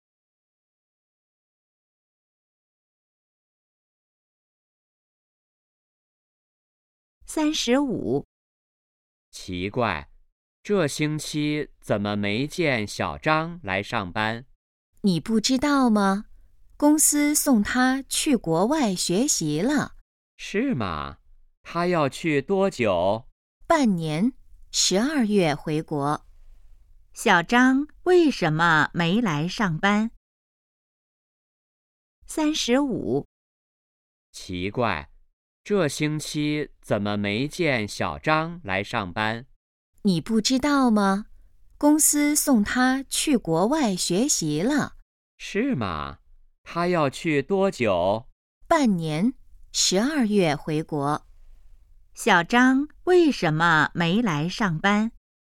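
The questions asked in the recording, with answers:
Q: 小张为什么没来上班?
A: 公司送他去国外学习了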